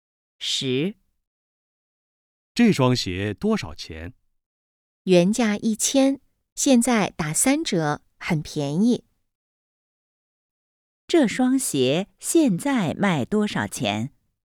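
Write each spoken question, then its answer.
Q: 这双鞋现在卖多少钱?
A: 300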